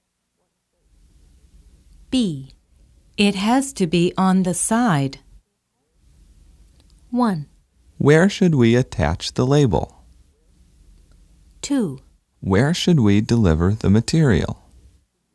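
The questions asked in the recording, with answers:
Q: It has to be on the side.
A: 1: Where should we attach the label?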